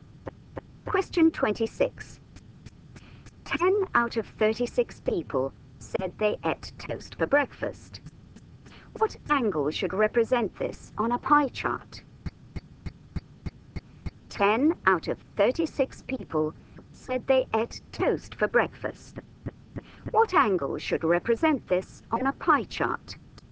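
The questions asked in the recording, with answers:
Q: What angle should represent this on a pie chart?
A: 100 degrees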